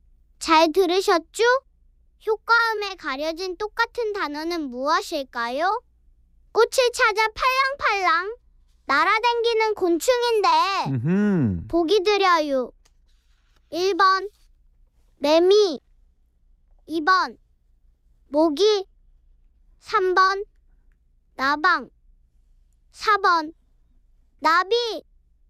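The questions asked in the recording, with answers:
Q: 효과음에 가려진 똑같은 단어는 무엇일까요?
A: 4번: 나비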